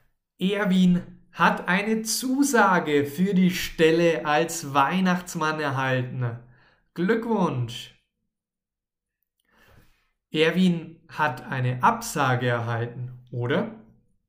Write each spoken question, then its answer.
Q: Erwin hat eine Absage erhalten, oder?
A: Aber nein, Erwin hat eine Zusage erhalten.